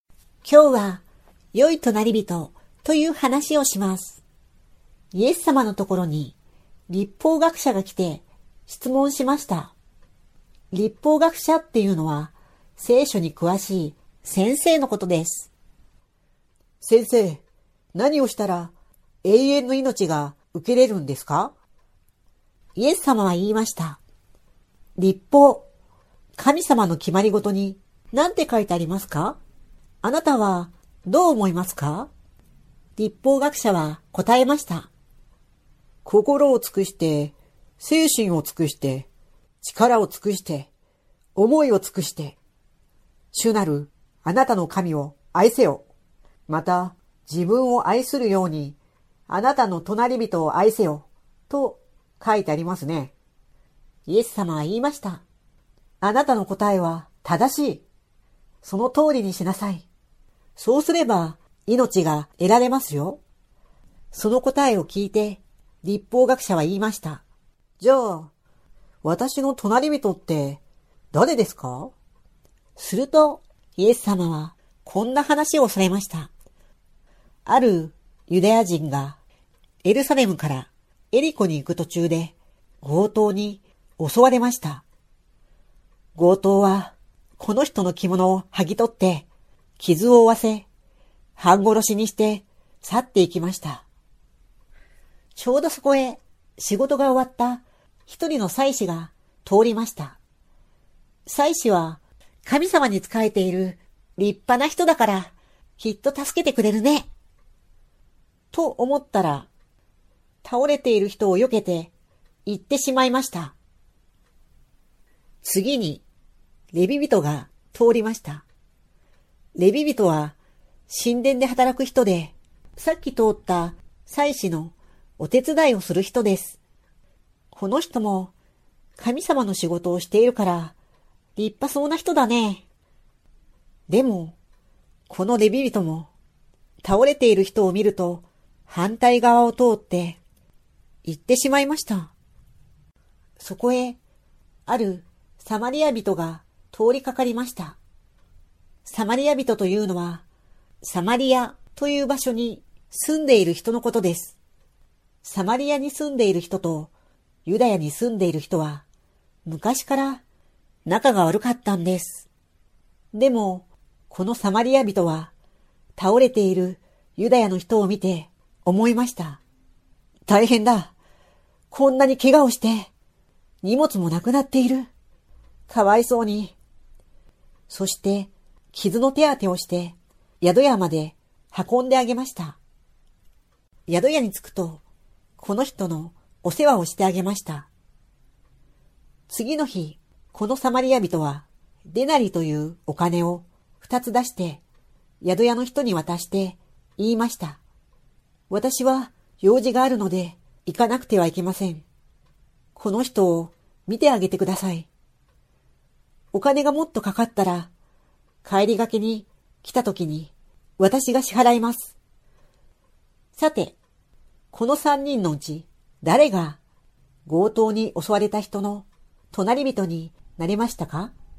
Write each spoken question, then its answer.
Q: さて、この三人のうち誰が強盗に襲われた人の隣人になれましたか?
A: 律法学者はその人に親切なことをした人です。